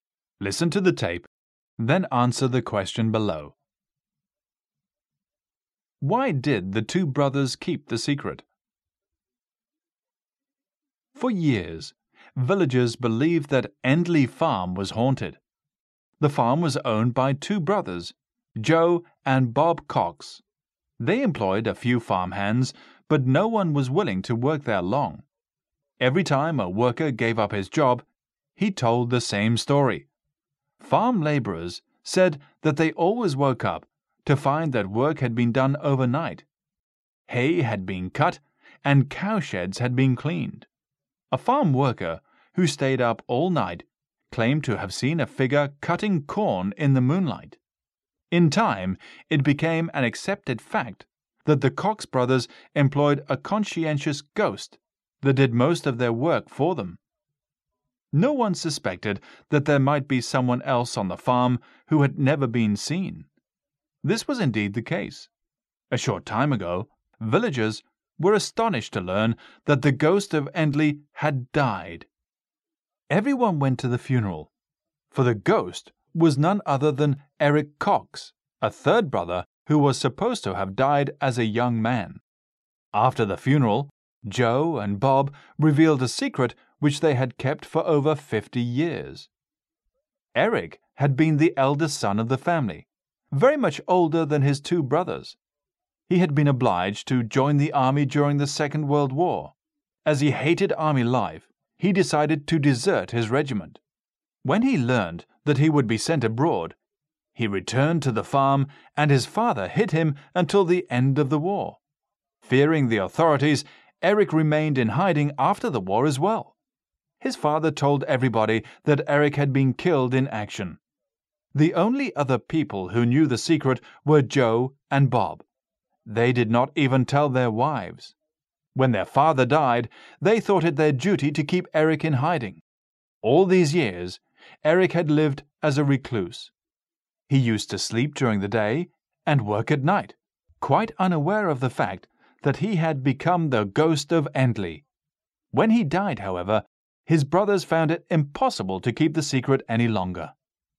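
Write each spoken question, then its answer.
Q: Why did the two brothers keep the secret?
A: To keep Eric hidden, because he had deserted the army and feared the authorities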